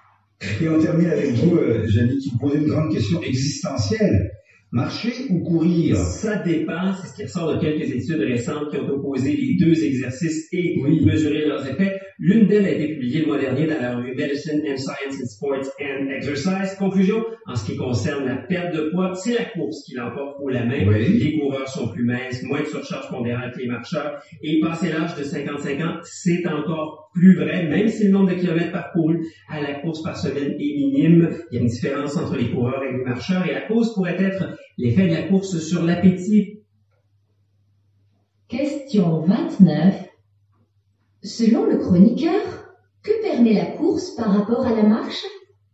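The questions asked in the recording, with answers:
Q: Selon le chroniqueur, que permet la course par rapport à la marche?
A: Elle permet de perdre davantage de poids.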